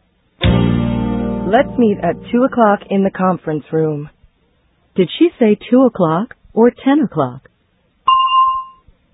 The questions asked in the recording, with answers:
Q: Did she say 2 o'clock or 10 o'clock?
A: She said 2 o'clock.